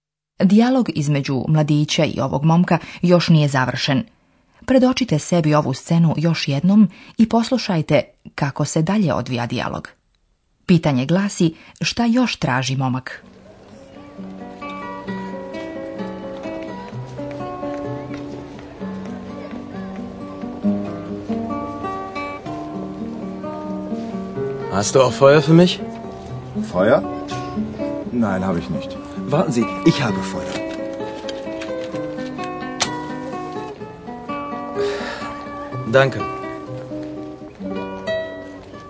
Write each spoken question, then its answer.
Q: šta još traži momak?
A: Ako hoće da zapali, treba mu osim cigarete i upaljač ili šibica.